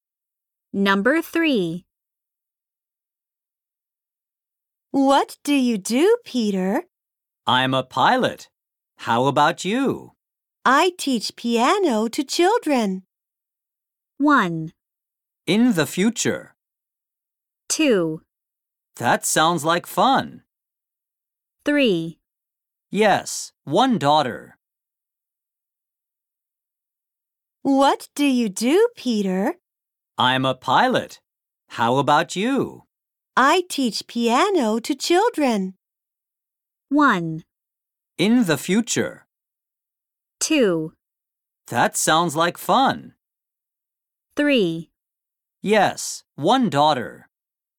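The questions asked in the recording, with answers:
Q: I teach piano to children.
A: 2: That sounds like fun.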